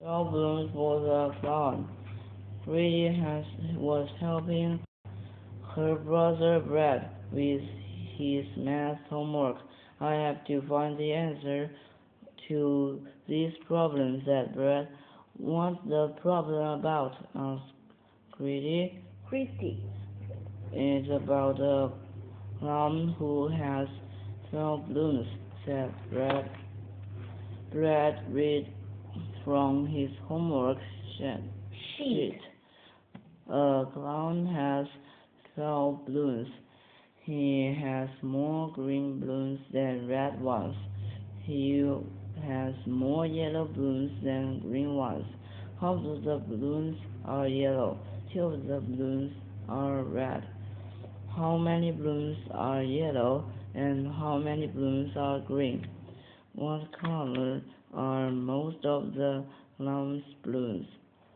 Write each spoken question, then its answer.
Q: What color are most of the clown's balloons?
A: Most of the clown's balloons are yellow.